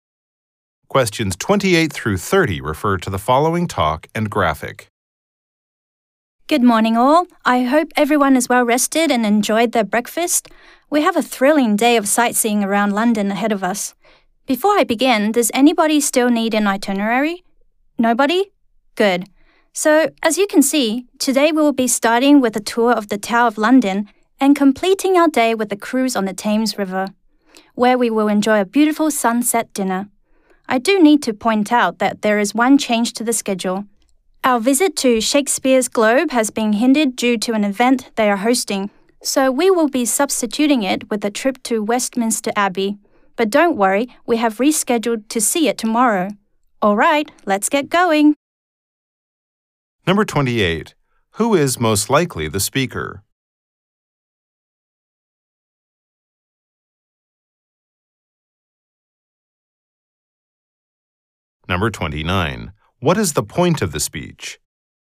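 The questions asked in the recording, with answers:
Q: Who is most likely the speaker?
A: A tour guide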